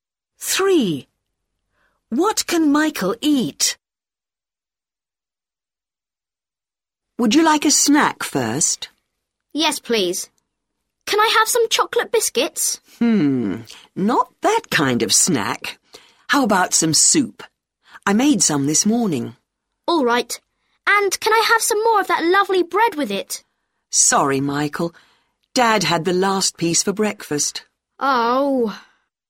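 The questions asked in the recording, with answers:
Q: What can Michael eat?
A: soup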